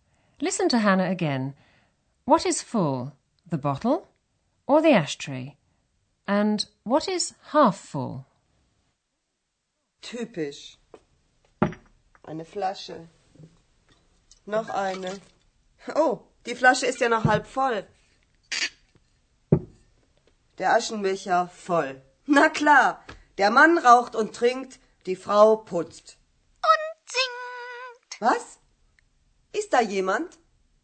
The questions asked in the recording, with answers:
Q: What is full, the bottle or the ashtray?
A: Hannah finds an ashtray which is full